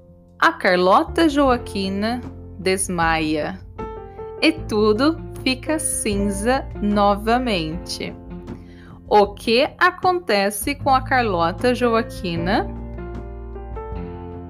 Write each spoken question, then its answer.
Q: O que acontece com a Carlota Joaquina?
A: Ela desmaia. A Carlota Joaquina desmaia e tudo fica cinza novamente.